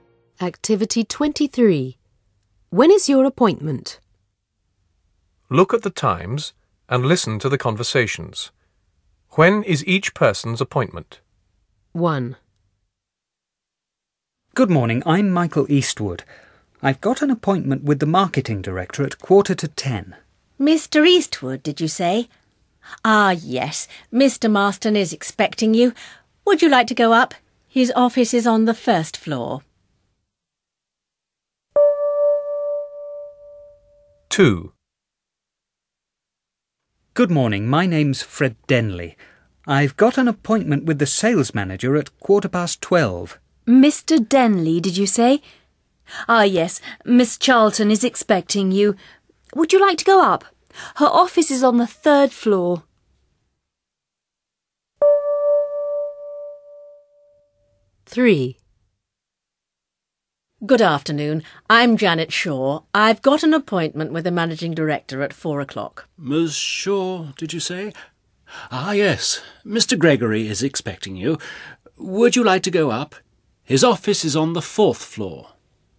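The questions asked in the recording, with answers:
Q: When is each person's appointment?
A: 9:45

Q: When is each person's appointment?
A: 12:15

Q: When is each person's appointment?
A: 4:00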